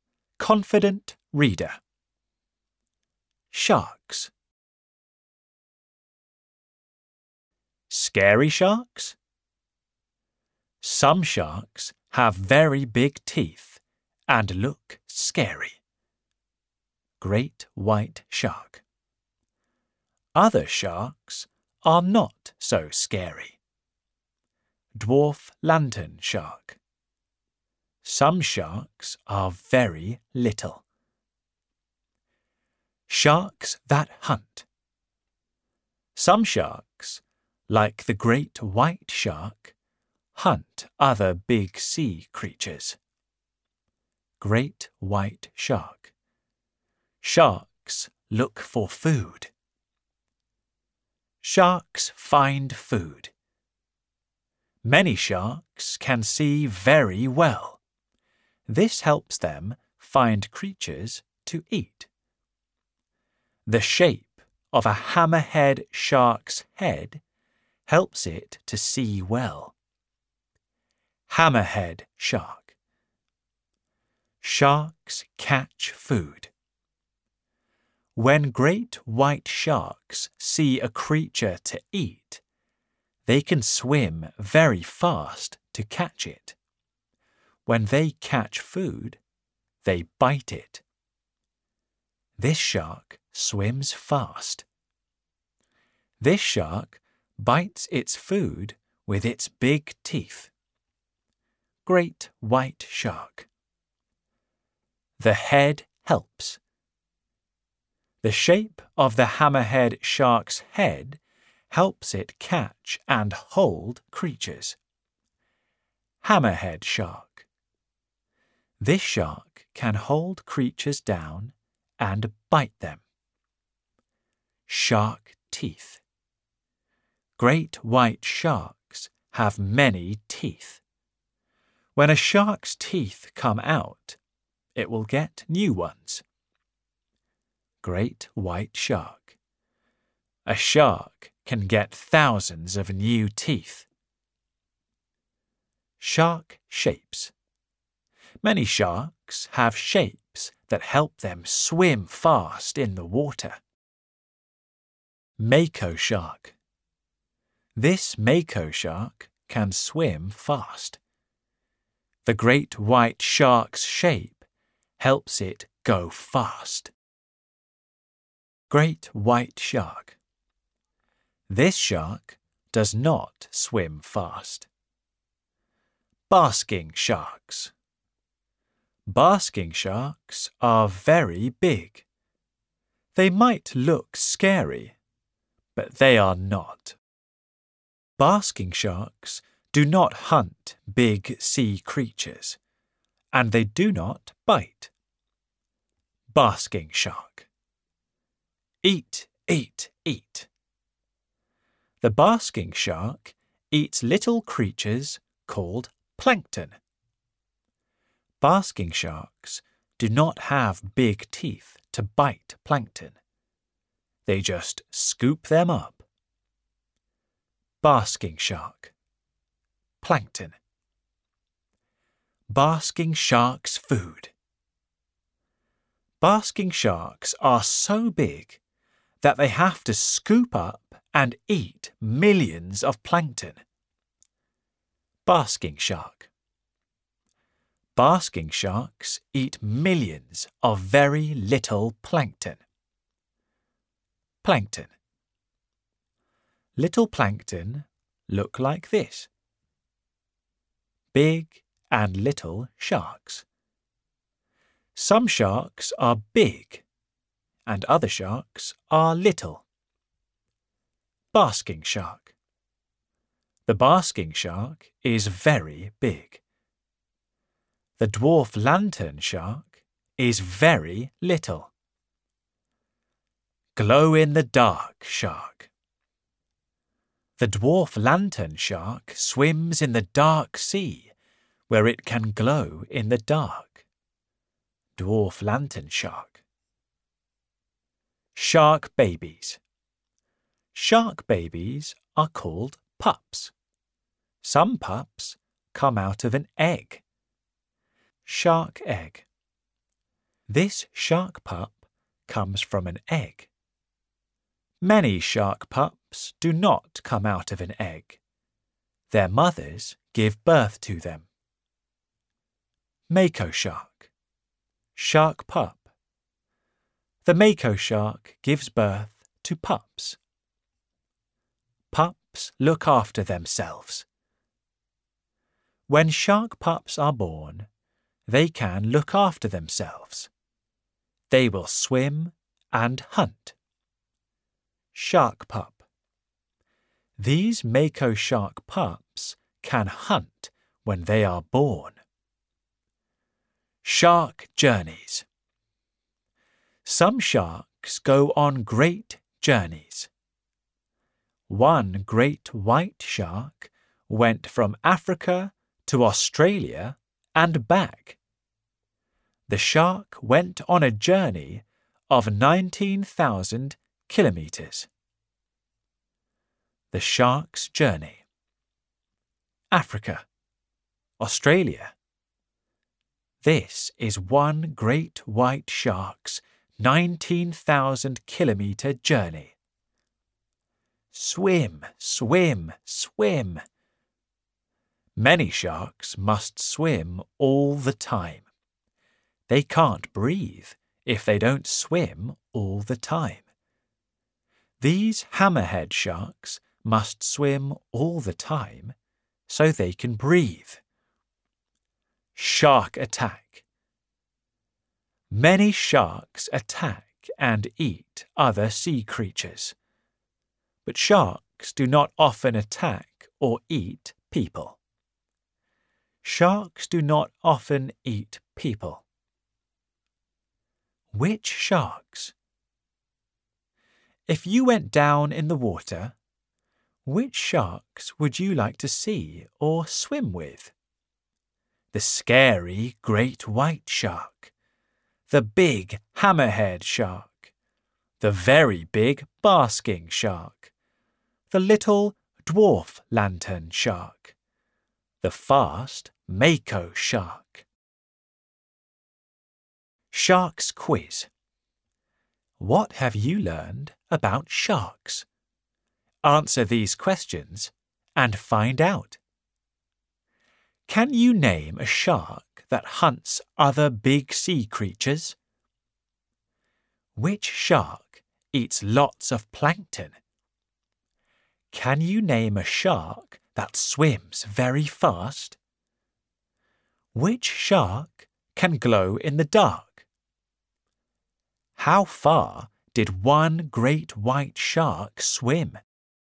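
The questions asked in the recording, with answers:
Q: Can you name a shark that hunts other big sea creatures?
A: The great white shark

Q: Which shark eats lots of plankton?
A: The basking shark

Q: Can you name a shark that swims very fast?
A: The mako shark

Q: Which shark can glow in the dark?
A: The dwarf lantern shark

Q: How far did one great white shark swim?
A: 19,000 kilometres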